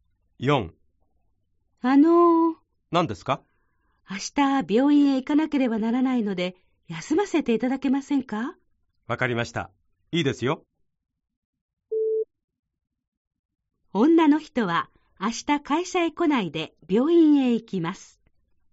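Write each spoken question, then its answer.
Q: 女の人は明日会社へ来ないで病院へ行きます。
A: ○(正しい)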